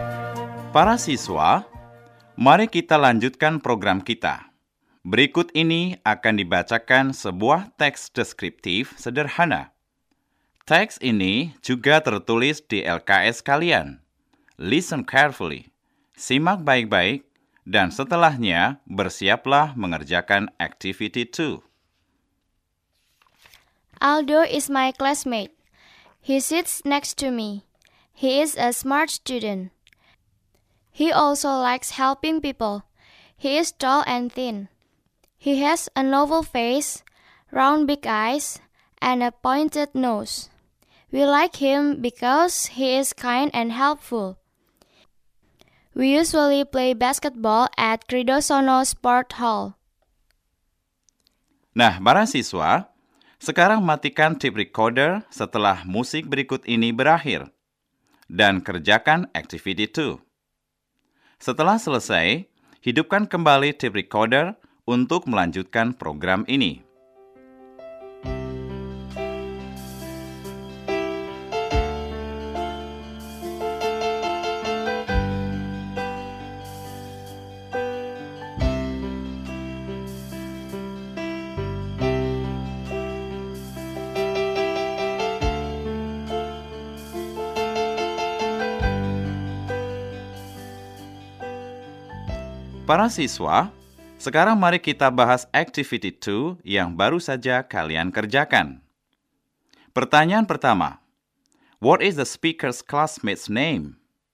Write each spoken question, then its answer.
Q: what is the speaker's classmate's name?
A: Jawaban yang benar adalah, Aldo is.